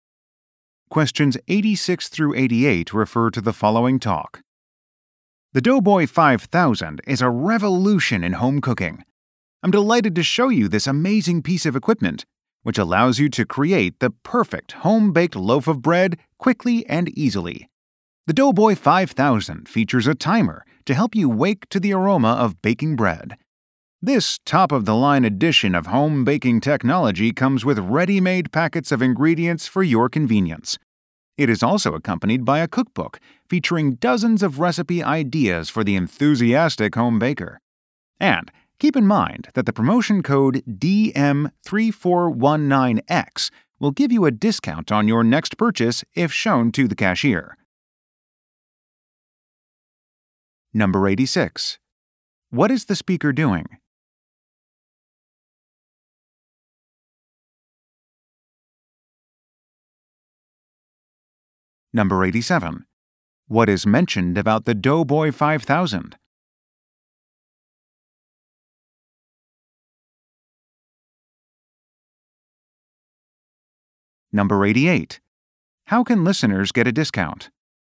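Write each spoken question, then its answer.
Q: What is the speaker doing?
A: Demonstrating a bread-making machine

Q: How can listeners get a discount?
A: By showing a promotion code to the cashier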